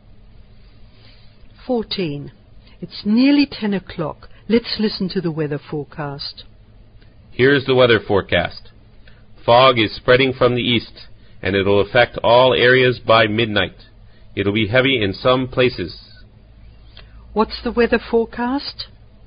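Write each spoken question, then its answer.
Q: What's the weather forecast?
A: Heavy fog spreading from the east to all areas by midnight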